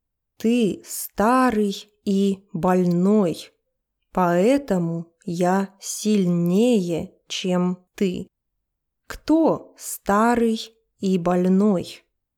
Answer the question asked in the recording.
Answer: Оби-Ван старый и больной.